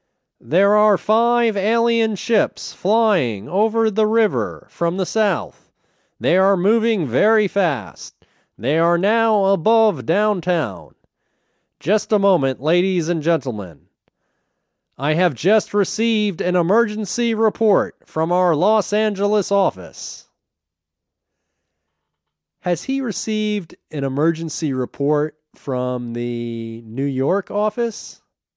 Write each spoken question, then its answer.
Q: Has he received an emergency report from the New York office?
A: No, he hasn't received an emergency report from the New York office.